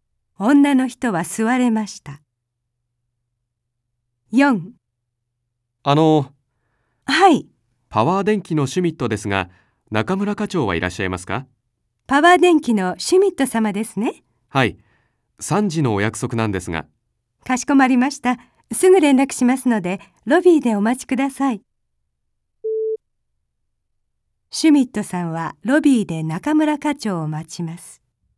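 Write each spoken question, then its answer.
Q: シュミットさんはロビーで中村課長を待ちます。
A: はい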